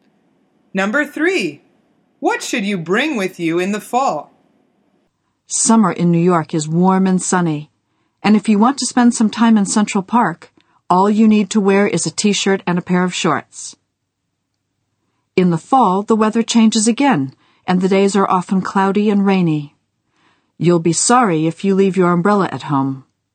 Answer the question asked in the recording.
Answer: The answer is an umbrella.